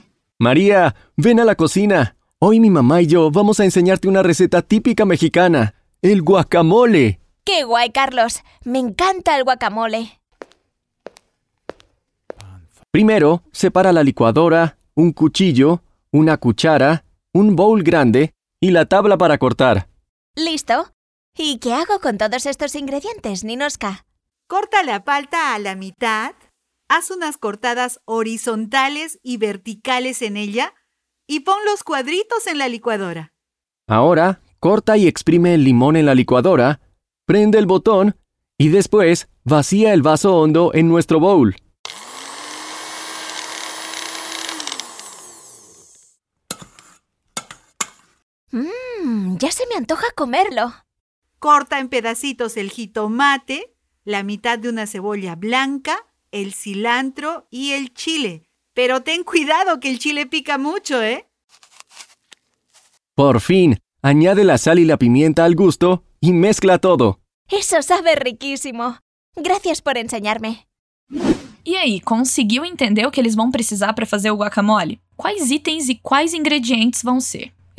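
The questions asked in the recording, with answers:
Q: Quais itens e quais ingredientes vão ser?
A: Itens: liquidificador (licuadora), faca (cuchillo), colher (cuchara), vasilha grande (bowl) e tábua para cortar (tabla). Ingredientes: abacate (palta), limão, jitomate, meia cebola branca, coentro (cilantro), pimenta (chile), sal e pimenta do reino.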